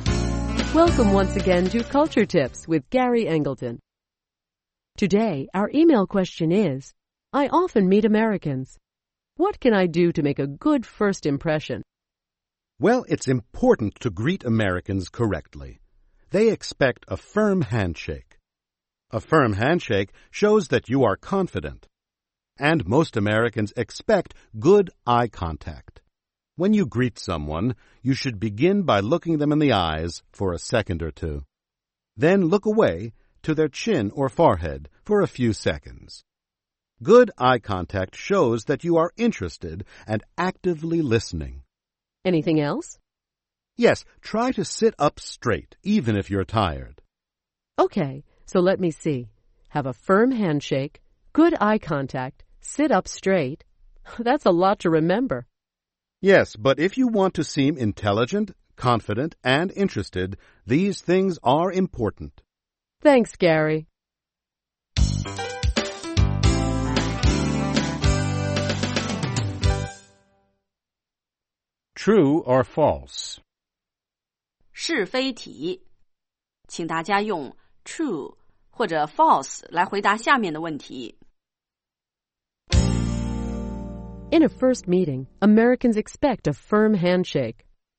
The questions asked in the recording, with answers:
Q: In a first meeting, Americans expect a firm handshake.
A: True. A firm handshake shows that you are confident.